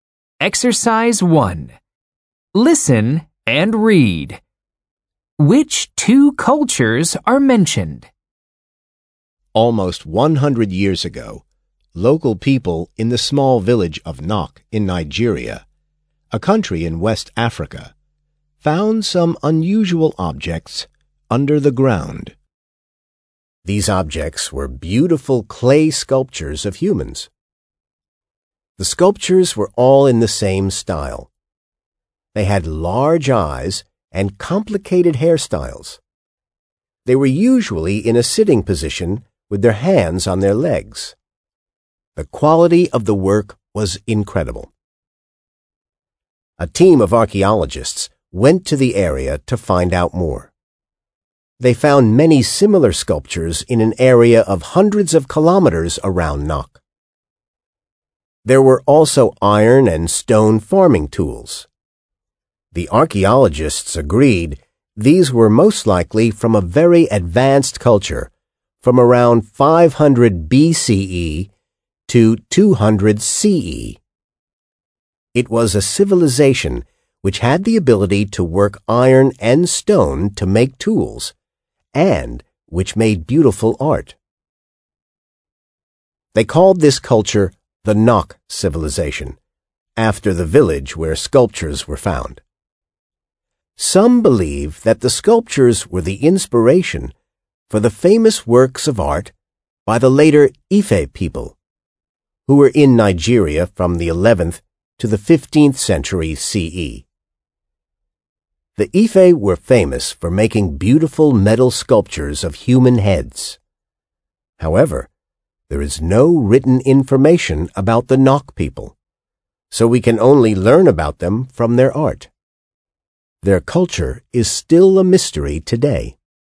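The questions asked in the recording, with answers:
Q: Which two cultures are mentioned?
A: The Nok civilization and the Ife people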